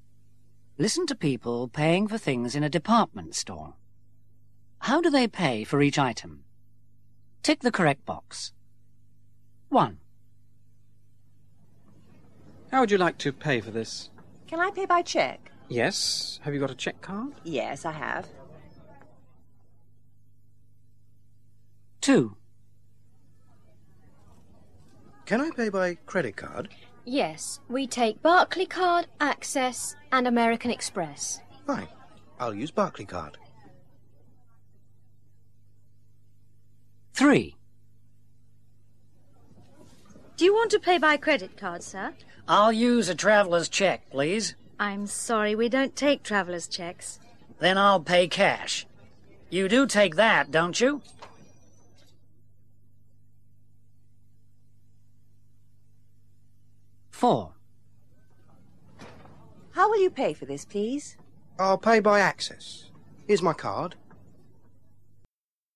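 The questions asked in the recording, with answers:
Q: How do they pay for each item?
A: By cheque

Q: How do they pay for each item?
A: By credit card (Barclay Card)

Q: How do they pay for each item?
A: Cash

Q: How do they pay for each item?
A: By credit card (Access)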